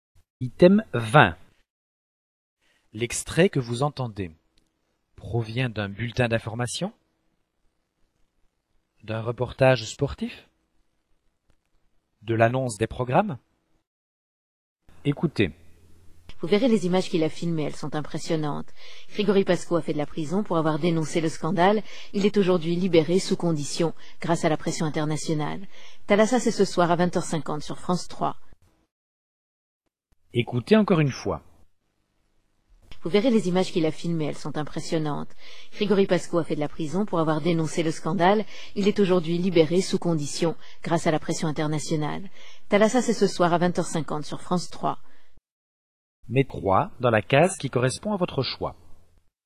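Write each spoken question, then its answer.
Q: L'extrait que vous entendez provient d'un bulletin d'information, d'un reportage sportif, de l'annonce des programmes.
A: de l'annonce des programmes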